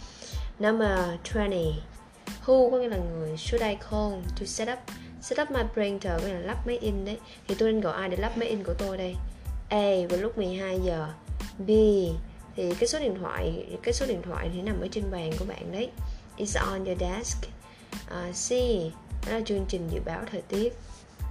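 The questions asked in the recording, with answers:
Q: Thì tôi nên gọi ai để lắp máy in của tôi đây?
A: B: Số điện thoại nằm ở trên bàn của bạn.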